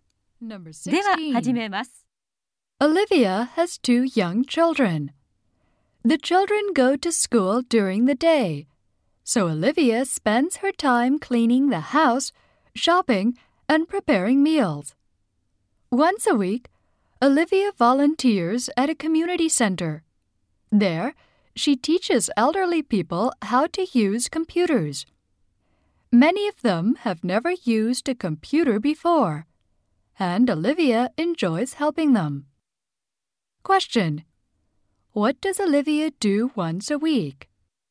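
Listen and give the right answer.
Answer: She teaches elderly people how to use computers at a community center.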